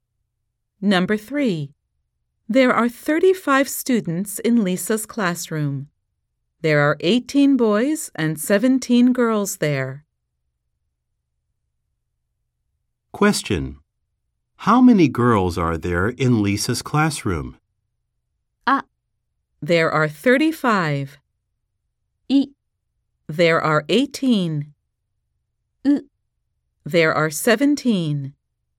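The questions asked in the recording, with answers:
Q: How many girls are there in Lisa's classroom?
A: ウ: There are 17.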